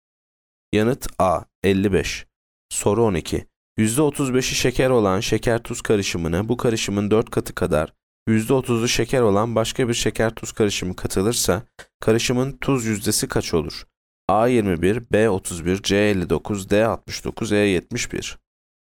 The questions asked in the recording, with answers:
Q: %35'i şeker olan şeker tuz karışımına bu karışımın 4 katı kadar %30'u şeker olan başka bir şeker tuz karışımı katılırsa karışımın tuz yüzdesi kaç olur?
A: Yanıt D 69.